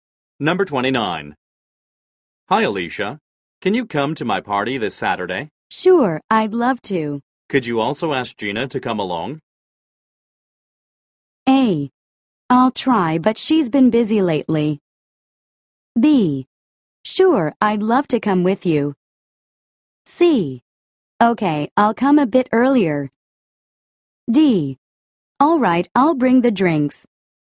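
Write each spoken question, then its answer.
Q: Could you also ask Gina to come along?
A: A: I'll try, but she's been busy lately.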